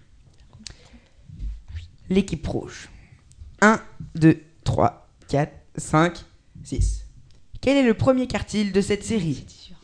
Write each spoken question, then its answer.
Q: Quel est le premier quartile de cette série?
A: Je dirais 2.